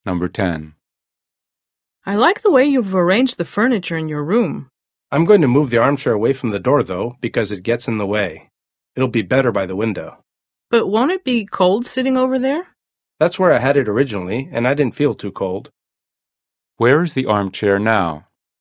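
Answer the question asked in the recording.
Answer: By the door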